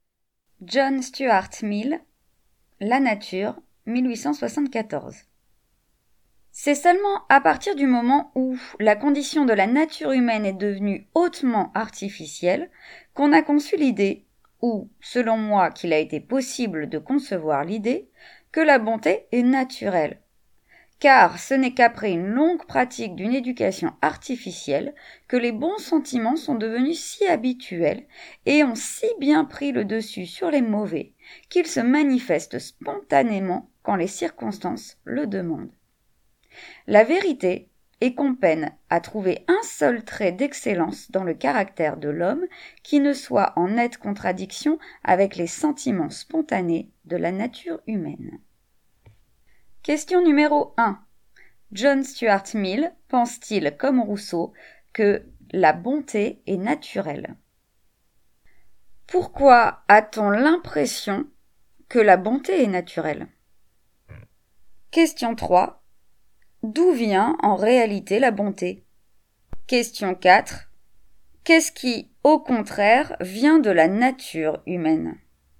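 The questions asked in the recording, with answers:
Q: John Stuart Mill pense-t-il, comme Rousseau, que la bonté est naturelle?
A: Non, pour lui la bonté n'est pas naturelle

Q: Pourquoi a-t-on l'impression que la bonté est naturelle?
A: Parce qu'après une longue éducation artificielle, les bons sentiments sont devenus si habituels qu'ils se manifestent spontanément

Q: D'où vient en réalité la bonté?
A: D'une longue pratique d'une éducation artificielle

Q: Qu'est-ce qui, au contraire, vient de la nature humaine?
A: Les mauvais sentiments, qui contredisent toute excellence du caractère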